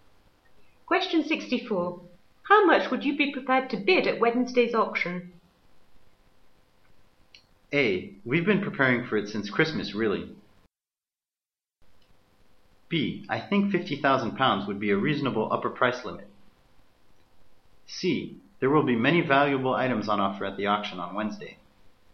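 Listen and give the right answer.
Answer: B: I think £50,000 would be a reasonable upper price limit.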